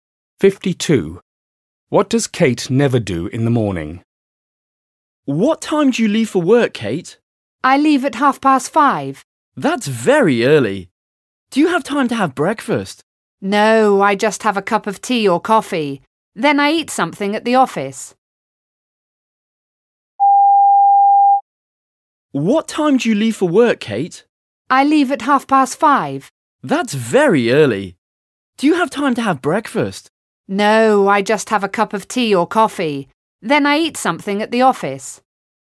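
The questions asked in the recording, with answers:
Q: What does Kate never do in the morning?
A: Have breakfast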